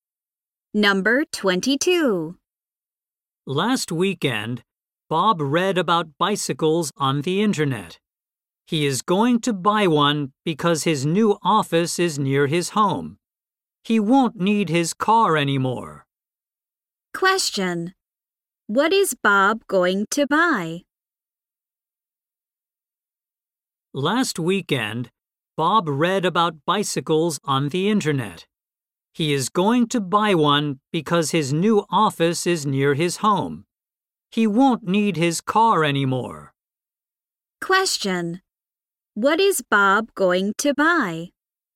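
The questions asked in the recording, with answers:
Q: What is Bob going to buy?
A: A bicycle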